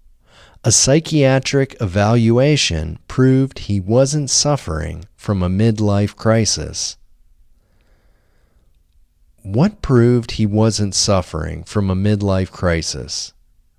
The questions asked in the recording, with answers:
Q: What proved he wasn't suffering from a midlife crisis?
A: A psychiatric evaluation proved he wasn't suffering from a midlife crisis.